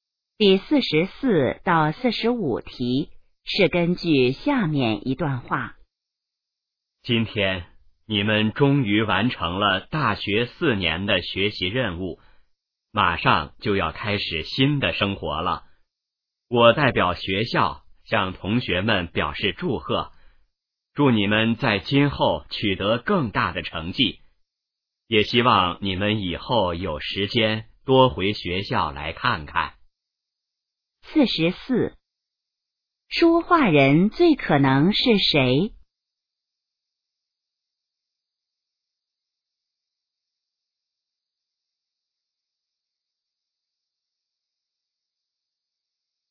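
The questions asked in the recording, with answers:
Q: 这段话最可能是在什么时候说的?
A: 大学毕业时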